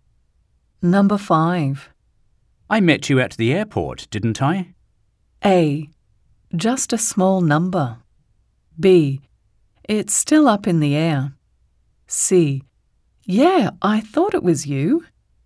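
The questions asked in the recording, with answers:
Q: I met you at the airport, didn't I?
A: C: Yeah, I thought it was you.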